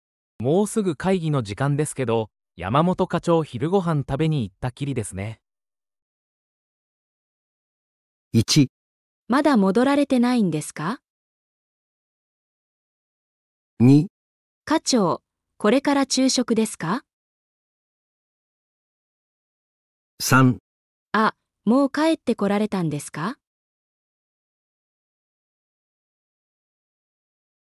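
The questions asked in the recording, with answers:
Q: もうすぐ会議の時間ですけど、山本課長昼ご飯食べに行ったきりですね。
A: 1: まだ戻られてないんですか?

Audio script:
男:もうすぐ会議の時間ですけど、山本課長、昼ごはん食べに行ったきりですね。
1.まだ戻られてないんですか?
2.課長、これから昼食ですか?
3.あ、もう帰ってこられたんですか?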